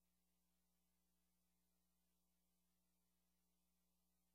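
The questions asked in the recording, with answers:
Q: What does the woman mean?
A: She doesn't want the dinner special.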